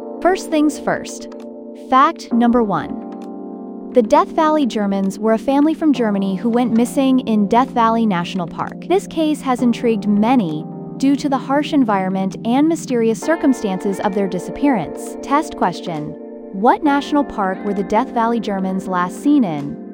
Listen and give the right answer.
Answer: Death Valley National Park.